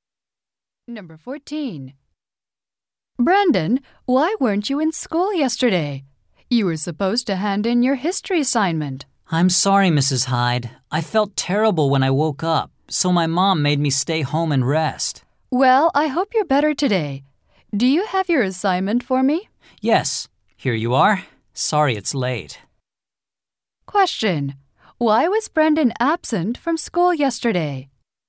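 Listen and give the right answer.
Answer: He felt sick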